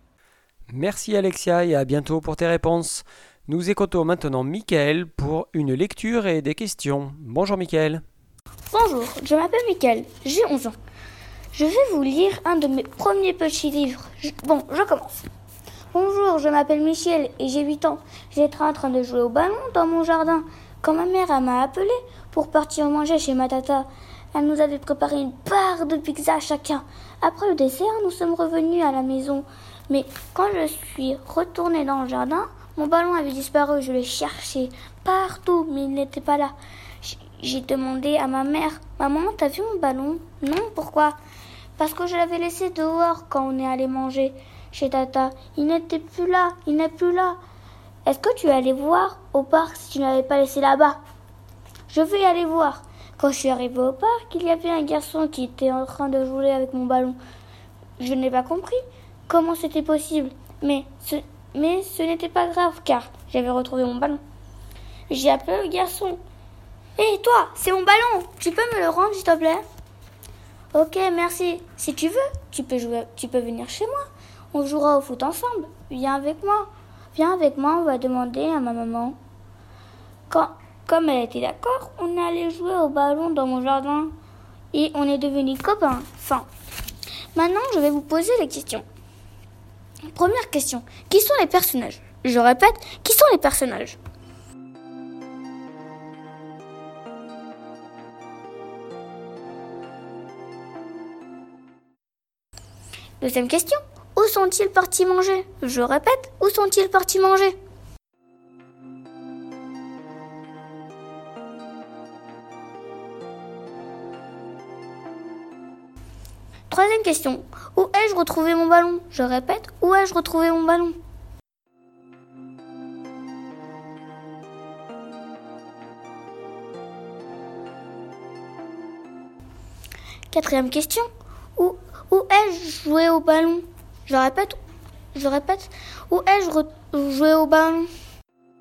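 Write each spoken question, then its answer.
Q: où sont-ils partis manger?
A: chez sa tata

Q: où ai-je retrouvé mon ballon?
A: au parc

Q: où ai-je joué au ballon?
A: dans mon jardin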